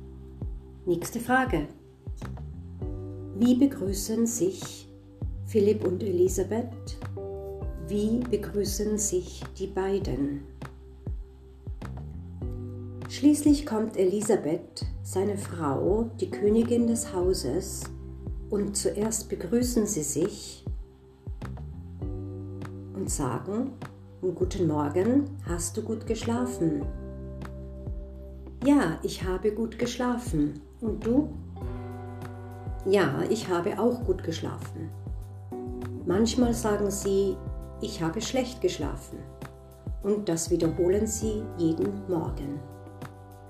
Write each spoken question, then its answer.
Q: Wie begrüßen sich Philipp und Elisabeth?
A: Sie begrüßen sich, indem sie sagen, Guten Morgen, hast du gut geschlafen?